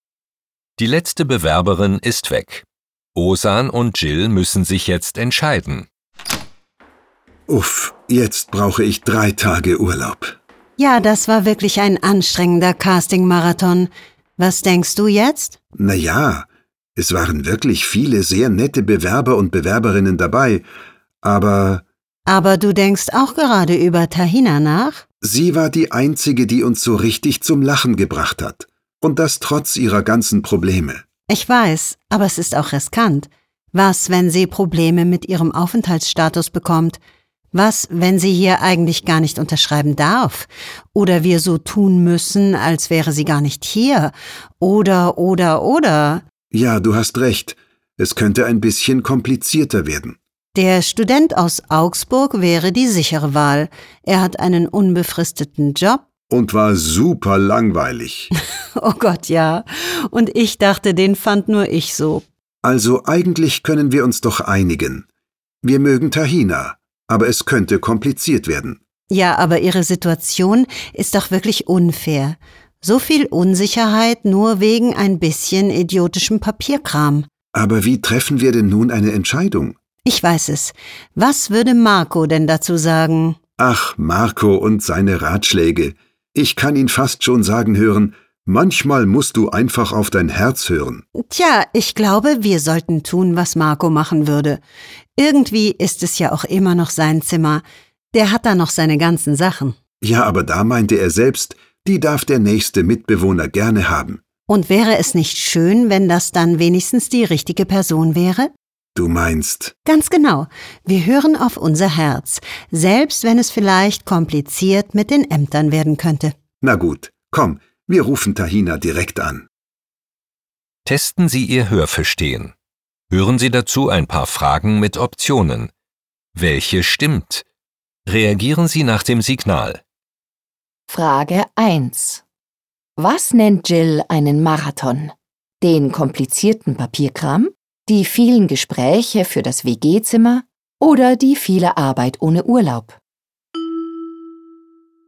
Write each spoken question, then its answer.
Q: Was nennt Jill einen Marathon?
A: Die vielen Gespräche für das WG-Zimmer sind für Jill wie ein Casting-Marathon.